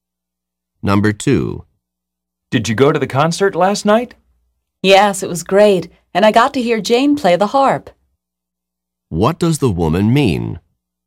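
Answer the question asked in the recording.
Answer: She heard Jane play the harp at the concert.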